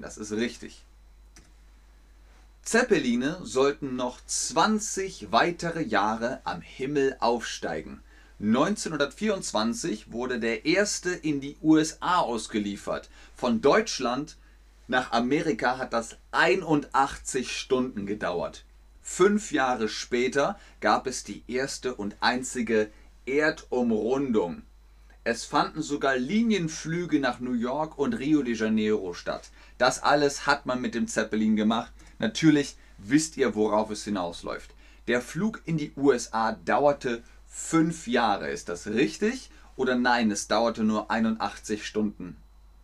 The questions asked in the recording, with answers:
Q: Der Flug in die USA dauerte fünf Jahre.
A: Der Flug in die USA dauerte nicht fünf Jahre, der dauerte 81 Stunden.